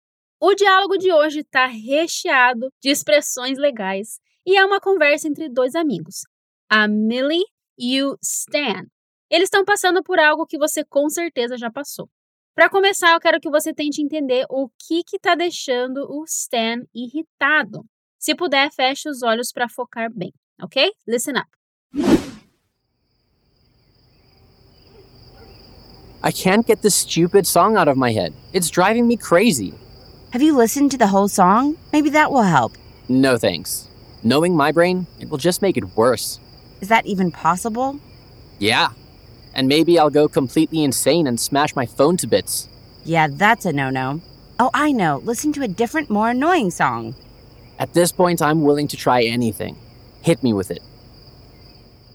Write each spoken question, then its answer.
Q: Para começar, eu quero que você tente entender o que está deixando o Stan irritado.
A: Uma música?